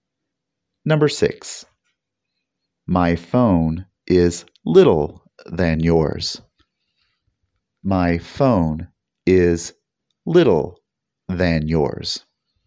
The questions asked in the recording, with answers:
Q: My phone is little than yours.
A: The answer is smaller, not littler.